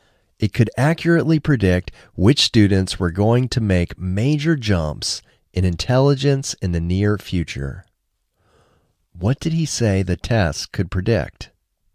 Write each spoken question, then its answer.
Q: What did he say the test could predict?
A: He said the test could predict which students were going to make major jumps in intelligence in the near future.